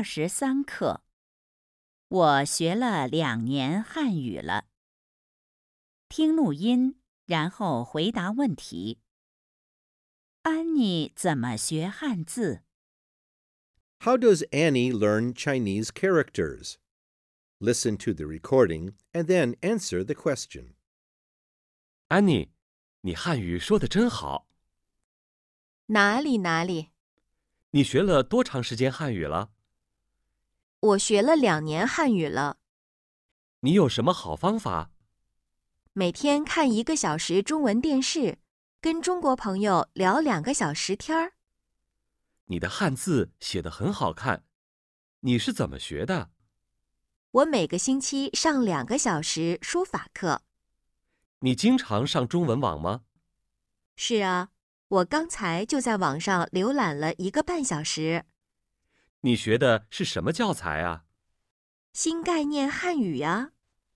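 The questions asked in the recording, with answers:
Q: 安妮怎么学汉字?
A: 每个星期上2个小时书法课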